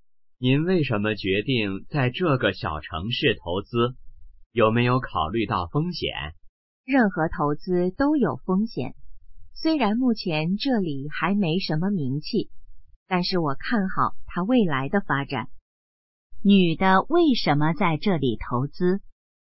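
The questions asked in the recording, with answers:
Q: 女的为什么在这里投资?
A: 看好这里未来的发展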